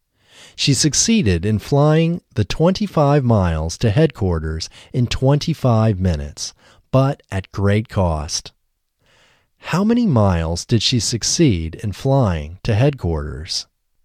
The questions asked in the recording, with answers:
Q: How many miles did she succeed in flying to headquarters?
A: She succeeded in flying 25 miles to headquarters.